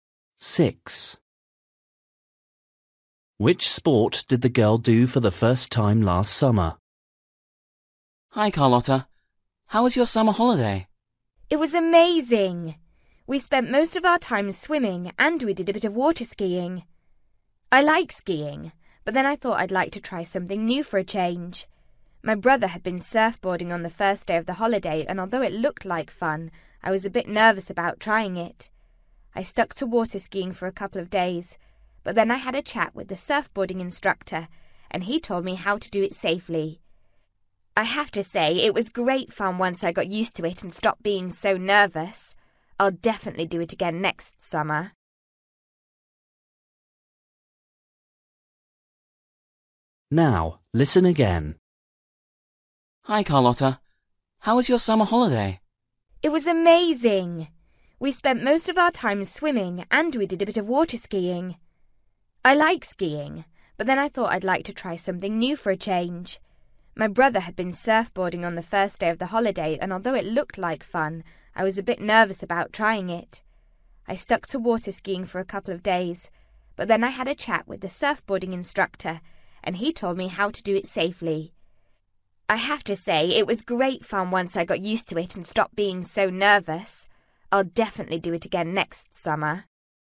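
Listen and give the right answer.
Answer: surfboarding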